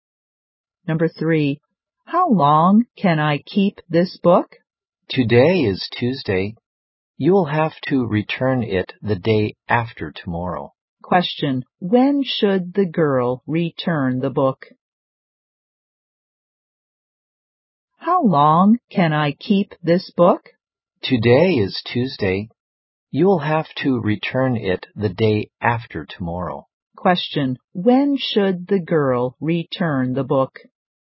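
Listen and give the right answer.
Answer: On Thursday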